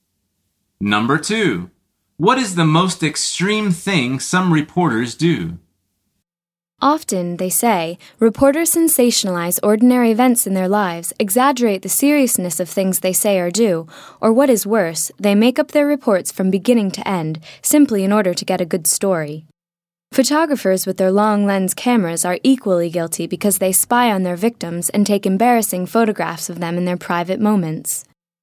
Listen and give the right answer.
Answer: The answer is invent whole stories.